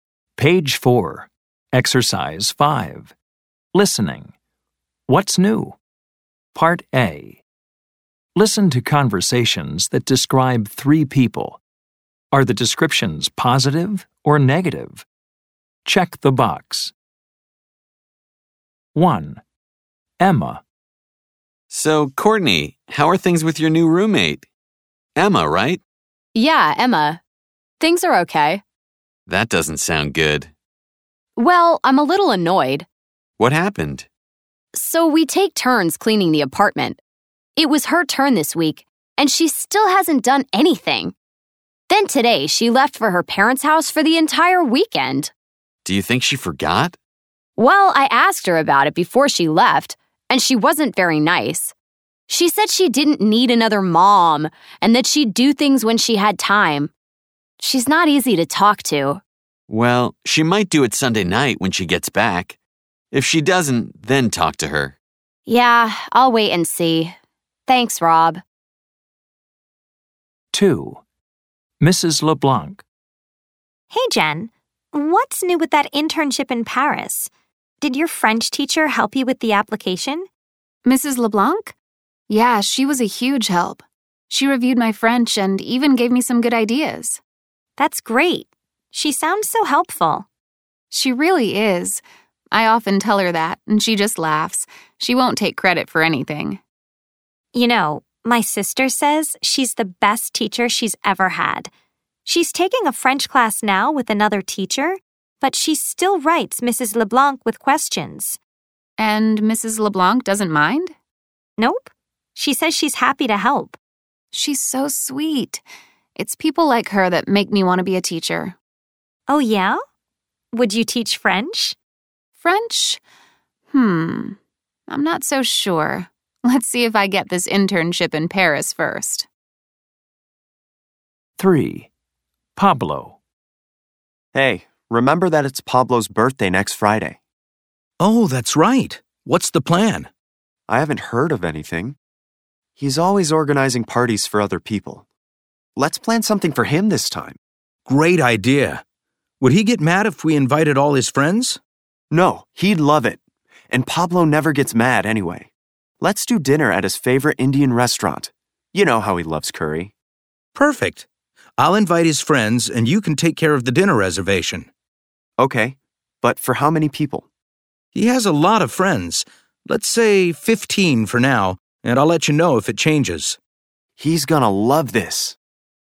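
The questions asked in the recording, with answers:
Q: Are the descriptions positive or negative?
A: Emma: negative

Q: Are the descriptions positive or negative?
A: Mrs. LeBlanc: positive

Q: Are the descriptions positive or negative?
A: Pablo: positive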